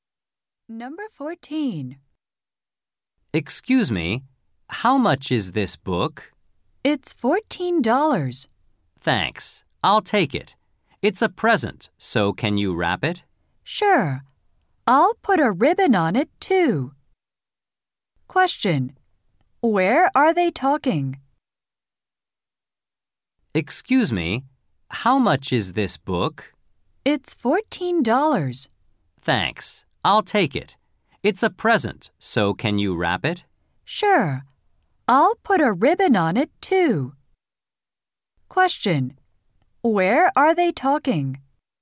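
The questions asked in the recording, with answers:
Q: Where are they talking?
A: At a bookstore.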